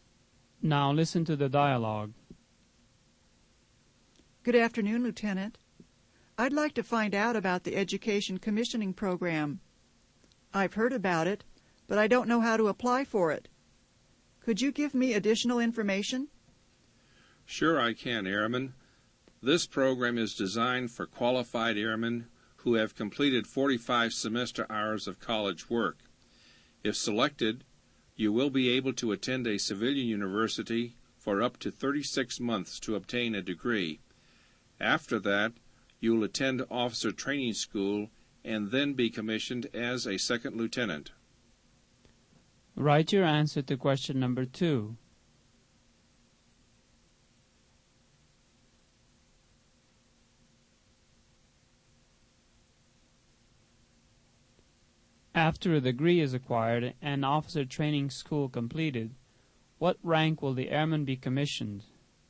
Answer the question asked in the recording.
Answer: The airman will be commissioned a second lieutenant.